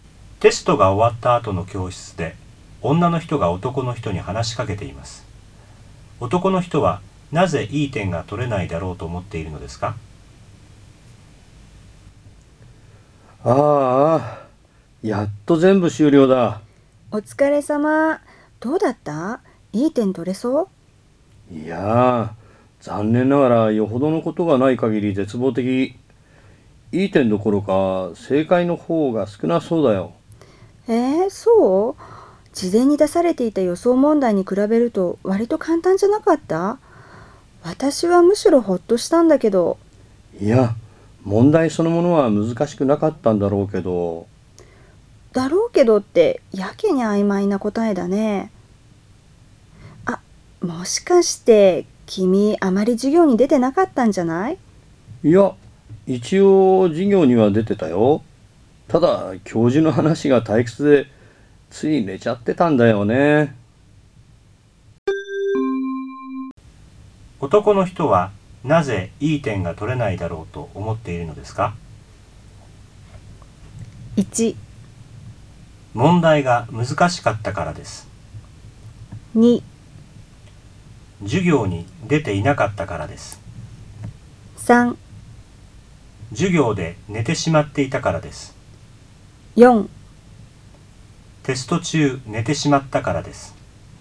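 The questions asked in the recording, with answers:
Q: 男の人はなぜいい点が取れないだろうと思っているのですか?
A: 3: 授業で寝てしまっていたからです。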